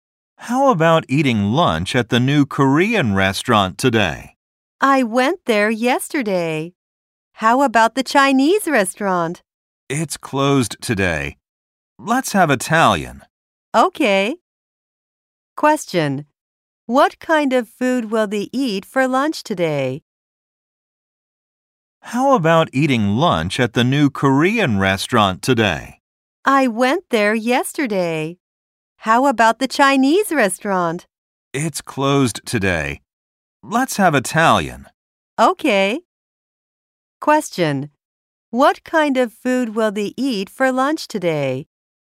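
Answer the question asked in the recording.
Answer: Italian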